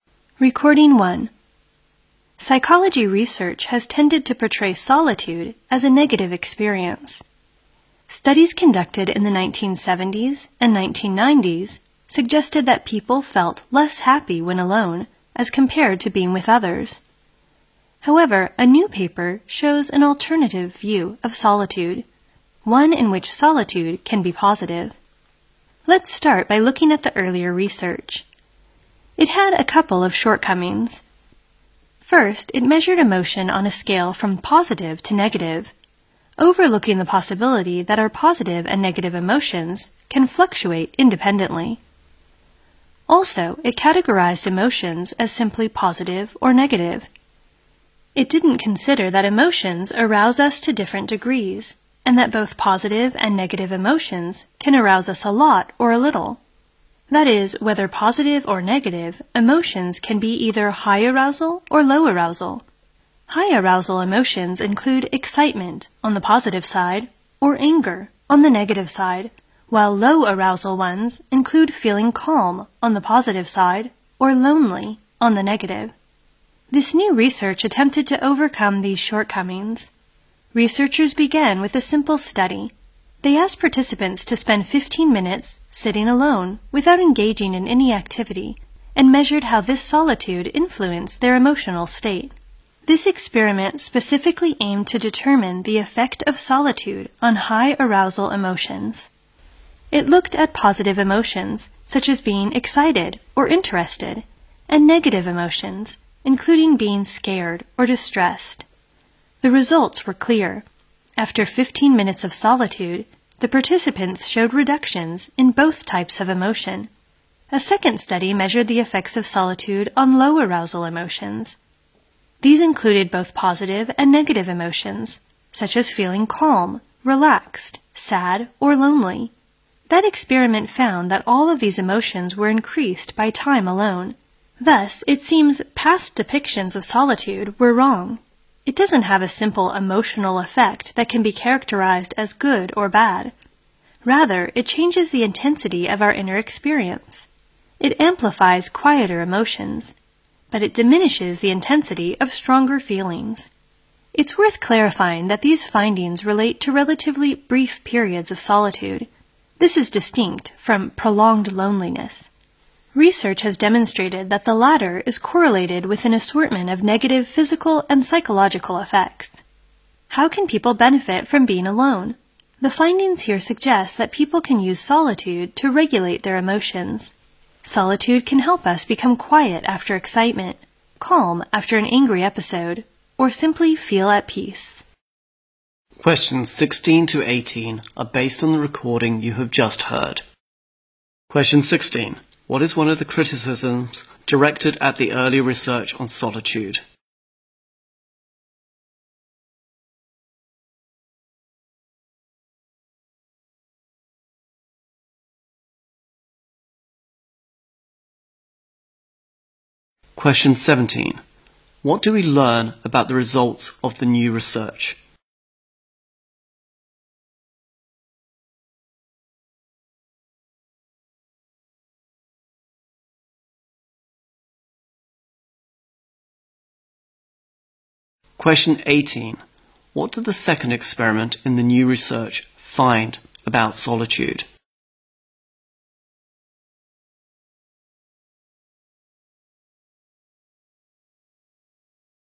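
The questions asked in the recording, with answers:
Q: What did the second experiment in the new research find about solitude?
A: It increased low-arousal emotions like calm, relaxation, sadness and loneliness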